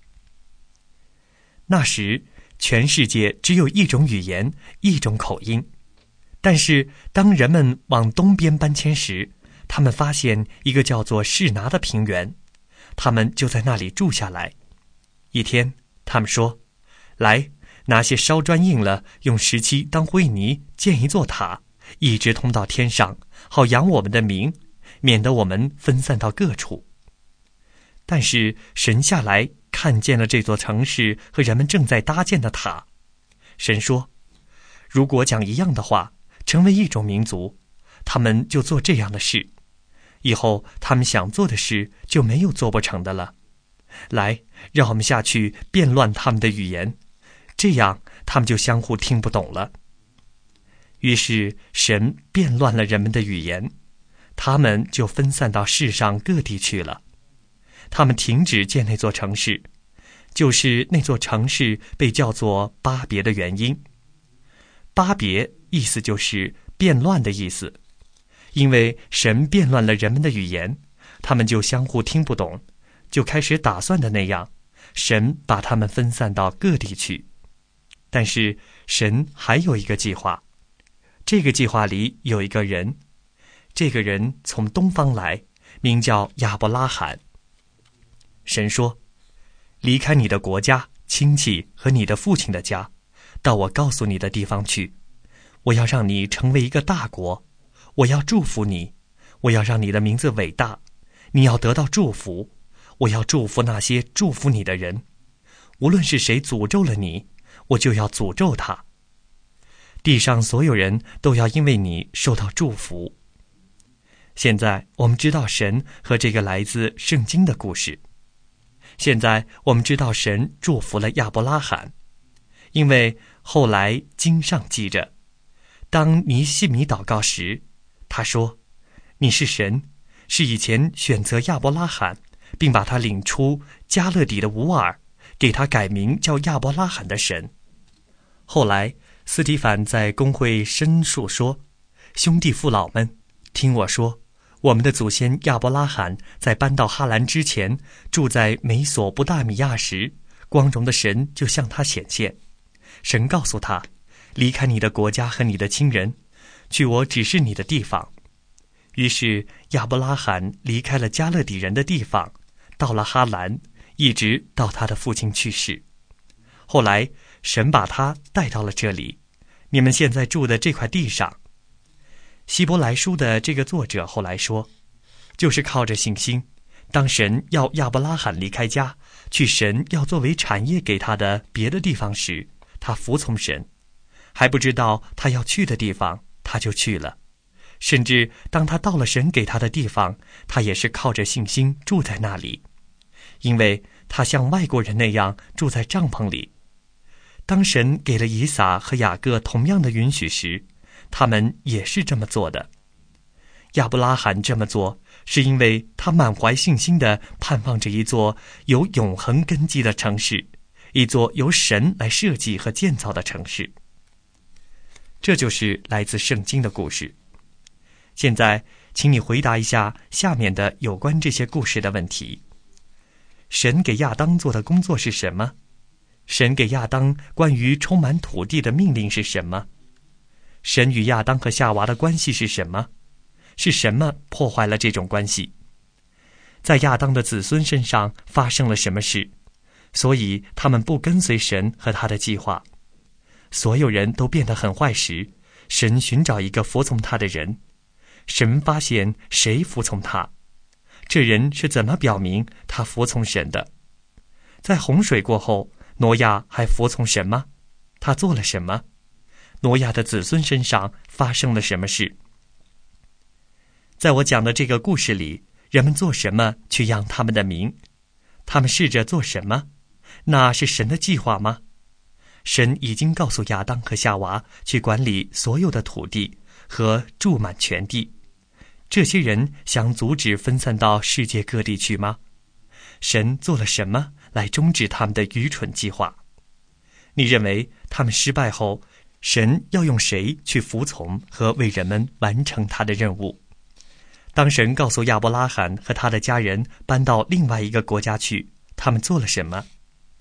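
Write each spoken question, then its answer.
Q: 在我讲的这个故事里,人们做什么去养他们的名?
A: 建一座通到天上的塔和城市

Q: 神做了什么来终止他们的愚蠢计划?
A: 变乱他们的语言,使他们分散到各地

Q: 当神告诉亚伯拉罕和他的家人搬到另外一个国家去,他们做了什么?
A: 他们服从神,凭着信心离开家,去了神指示的地方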